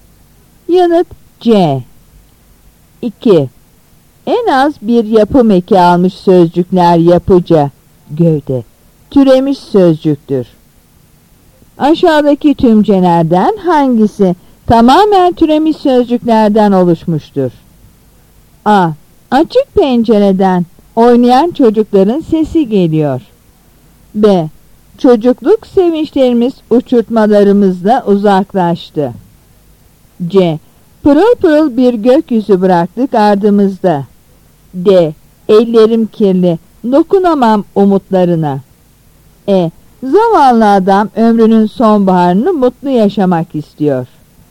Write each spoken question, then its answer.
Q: Aşağıdaki tümcelerden hangisi tamamen türemiş sözcüklerden oluşmuştur?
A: Yanıt B.